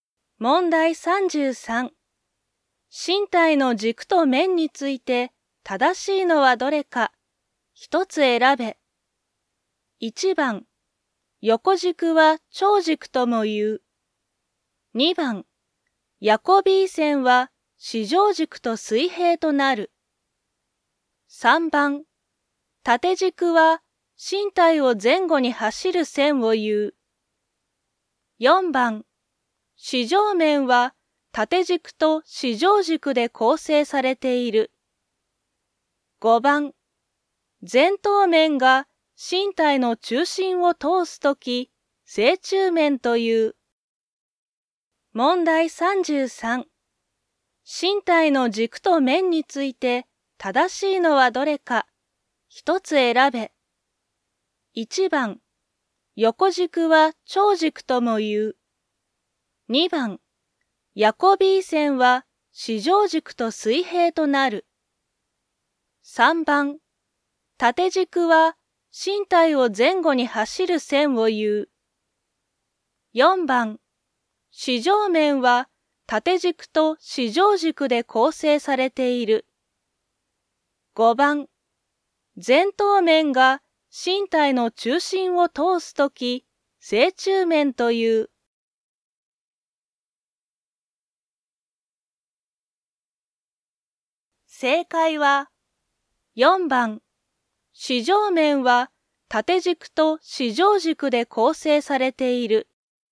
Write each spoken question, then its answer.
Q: 正しいのはどれか、一つ選べ。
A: 4番、四条面は縦軸と四条軸で構成されている。